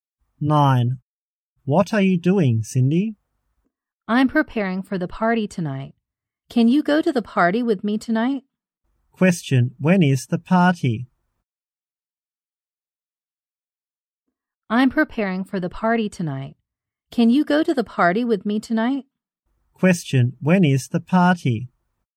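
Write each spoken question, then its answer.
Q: Question. When is the party?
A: Tonight.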